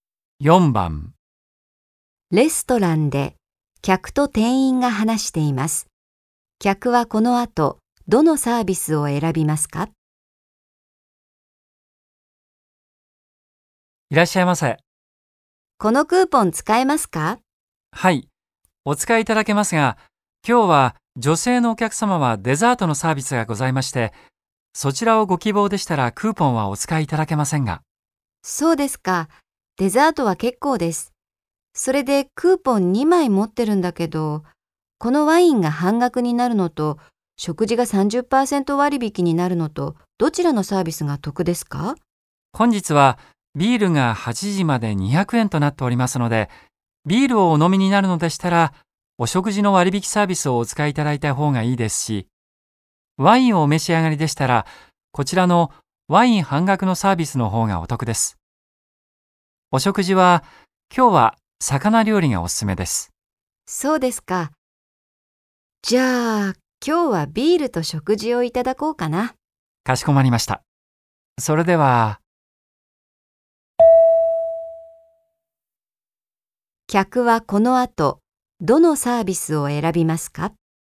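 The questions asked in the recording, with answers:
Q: 客はこの後どのサービスを選びますか?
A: 食事が30%割引になるサービス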